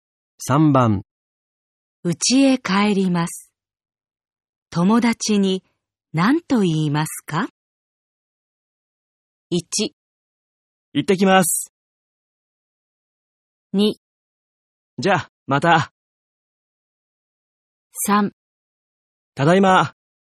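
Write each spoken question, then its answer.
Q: 家へ帰ります。友達に何と言いますか?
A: 2: じゃあ、また。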